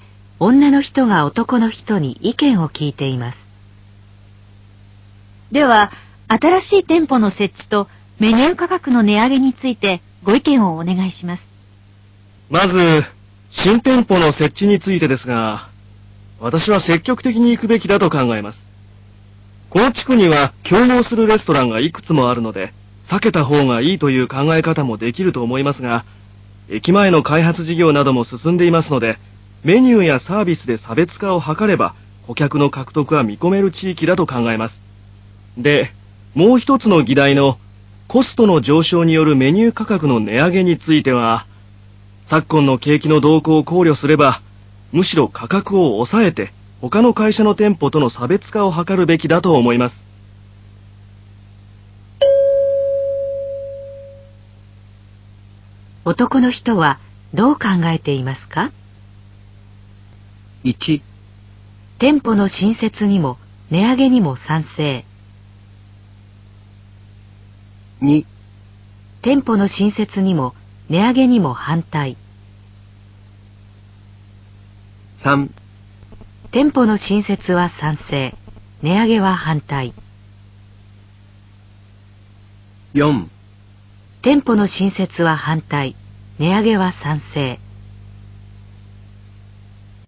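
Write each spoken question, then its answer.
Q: 男の人はどう考えていますか?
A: 3: 店舗の新設は賛成、値上げは反対。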